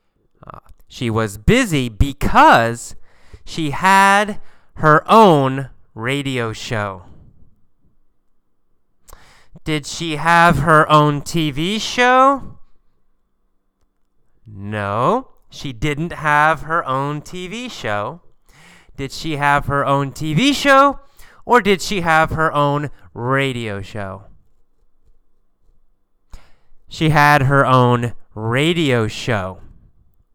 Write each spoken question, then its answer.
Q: Did she have her own TV show or did she have her own radio show?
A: She had her own radio show.